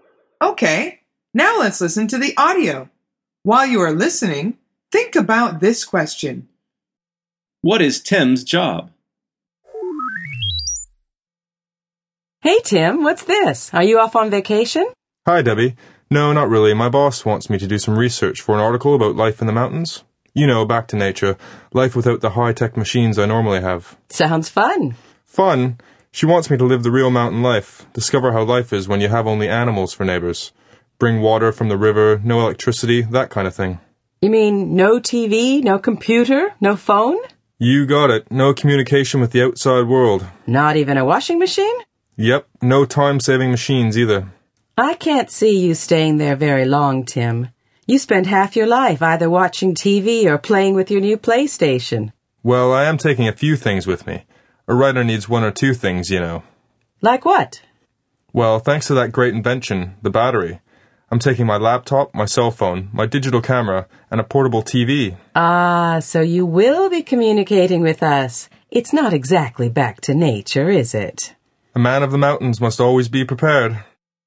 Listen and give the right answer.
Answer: He is a writer.